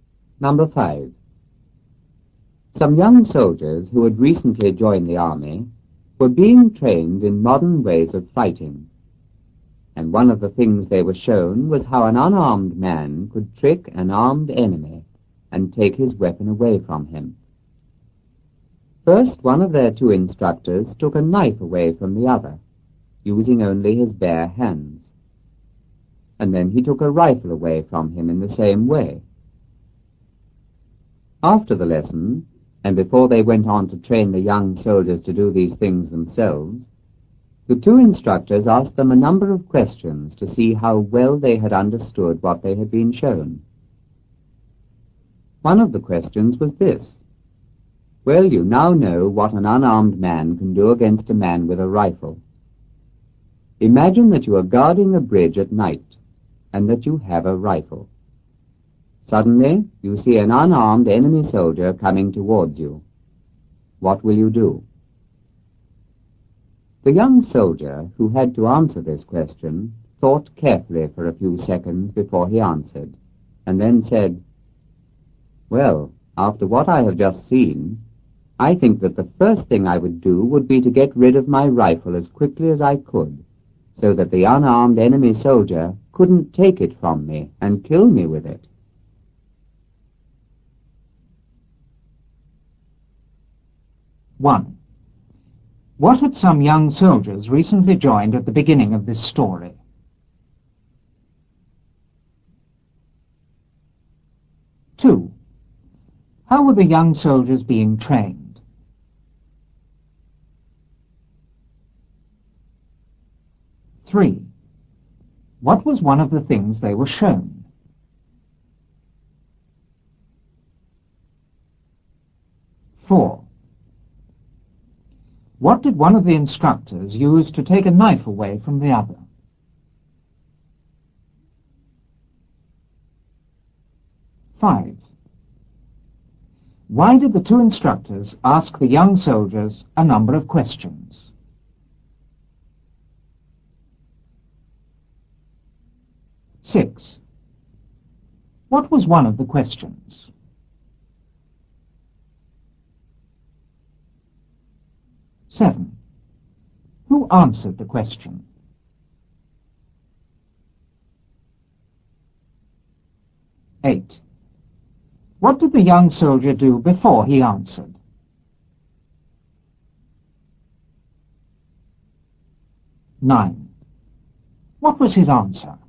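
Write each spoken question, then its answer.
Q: What had some young soldiers recently joined at the beginning of this story?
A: The army

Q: How were the young soldiers being trained?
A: In modern ways of fighting

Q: What was one of the things they were shown?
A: How an unarmed man could trick an armed enemy and take his weapon away from him

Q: What did one of the instructors use to take a knife away from the other?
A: Only his bare hands

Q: Why did the two instructors ask the young soldiers a number of questions?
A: To see how well they had understood what they had been shown

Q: What was one of the questions?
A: What would you do if you were guarding a bridge at night with a rifle and saw an unarmed enemy soldier coming towards you?

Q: Who answered the question?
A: One of the young soldiers

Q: What did the young soldier do before he answered?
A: He thought carefully for a few seconds

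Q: What was his answer?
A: He would get rid of his rifle as quickly as he could so the enemy couldn't take it and kill him with it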